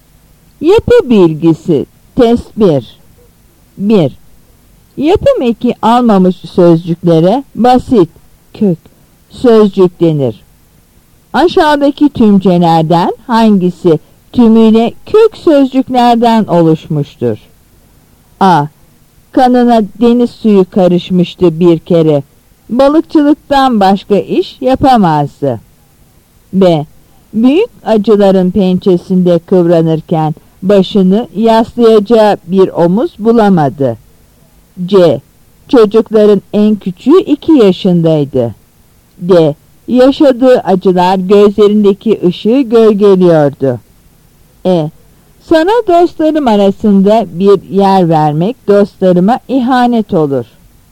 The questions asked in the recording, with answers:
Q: Aşağıdaki tümcelerden hangisi tümüyle kök sözcüklerden oluşmuştur?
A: Yanıt C.